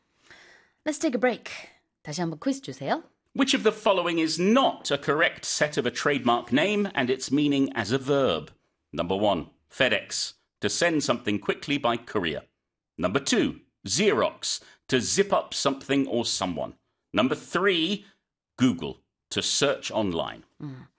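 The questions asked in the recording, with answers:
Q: Which of the following is not a correct set of a trademark name and its meaning as a verb?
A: 2: Xerox, to zip up something or someone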